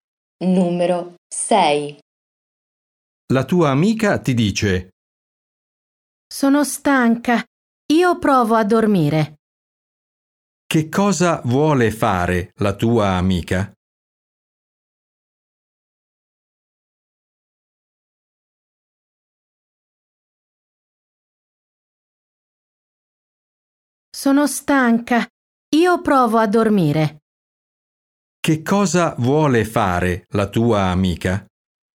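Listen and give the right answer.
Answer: Dormire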